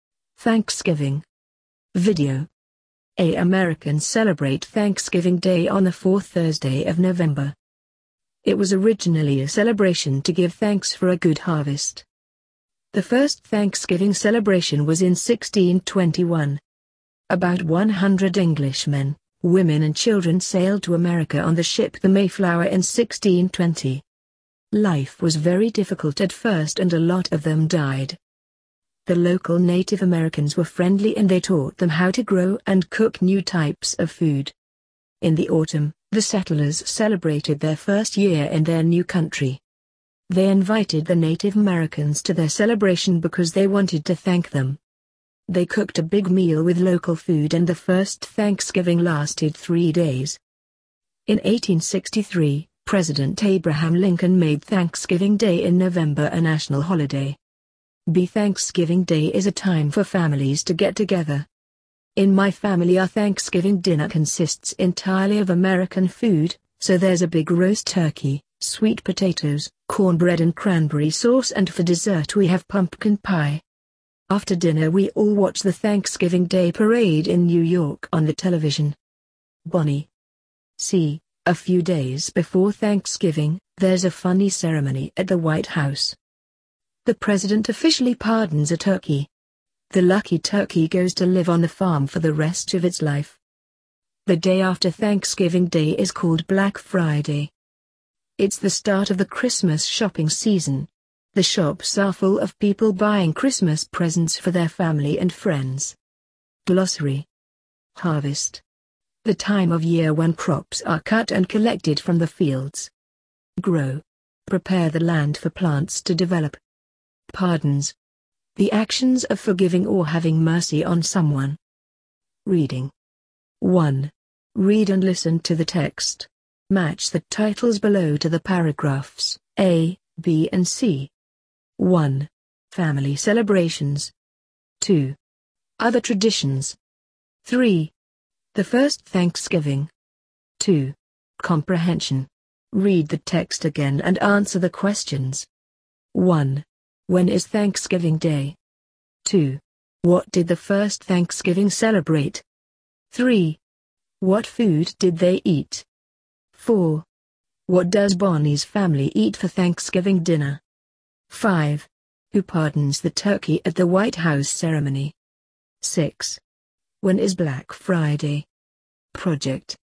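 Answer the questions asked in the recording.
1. On the fourth Thursday of November
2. The settlers' first year in their new country (a good harvest)
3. A big meal with local food
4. Roast turkey, sweet potatoes, cornbread, cranberry sauce and pumpkin pie
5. The president
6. The day after Thanksgiving Day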